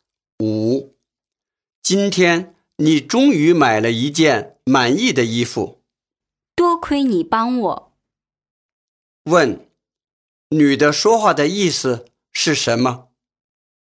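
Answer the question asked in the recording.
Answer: 感谢对方帮她买到满意的衣服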